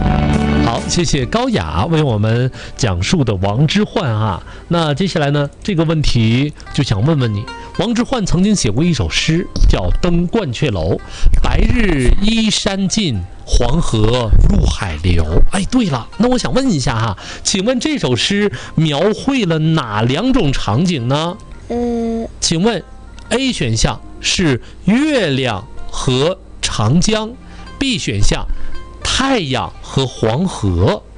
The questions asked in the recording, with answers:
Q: 请问这首诗描绘了哪两种场景呢?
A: 太阳和黄河。